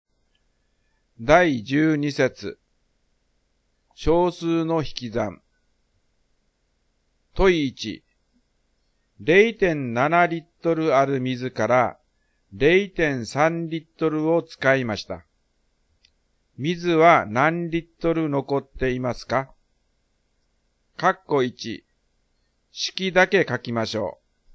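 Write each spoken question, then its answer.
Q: 水は何リットル残っていますか?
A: 0.4リットル(0.7-0.3)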